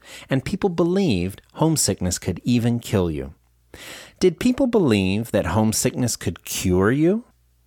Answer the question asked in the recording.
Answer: No, they didn't. They believed that homesickness could kill you.